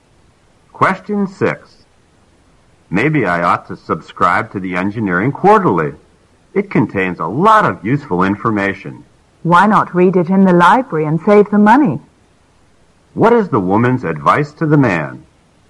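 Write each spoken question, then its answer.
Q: What is the woman's advice to the man?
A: Read the Engineering Quarterly in the library instead of subscribing, to save money.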